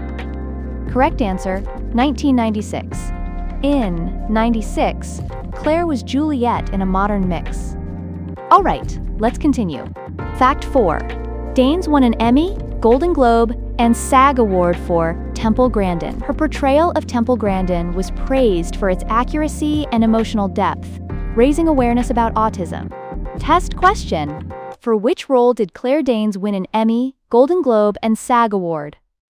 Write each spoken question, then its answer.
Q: for which role did Claire Danes win an Emmy, Golden Globe, and SAG Award?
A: Temple Grandin.